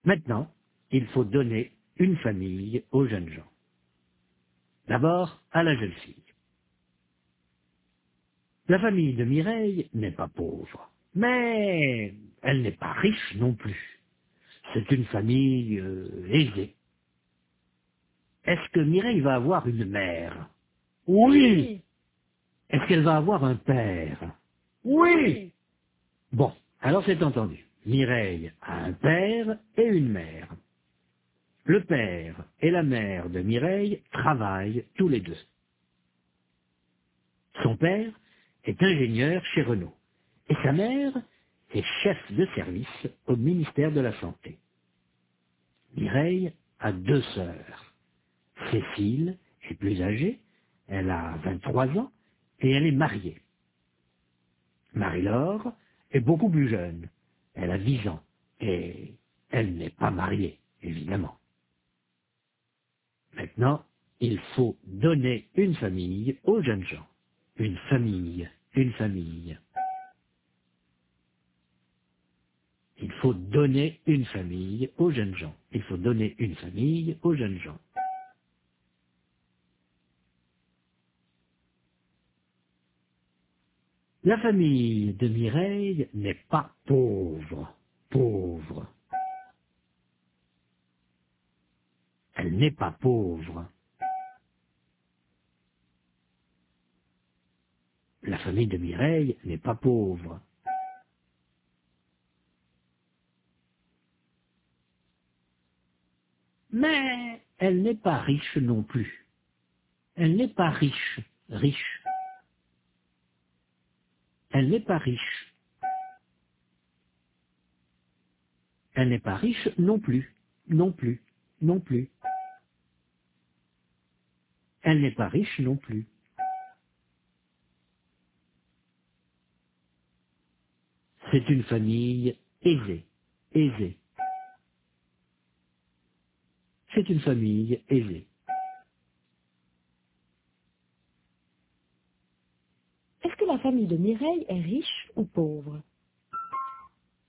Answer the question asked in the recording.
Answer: La famille de Mireille n'est pas riche, mais elle n'est pas pauvre non plus.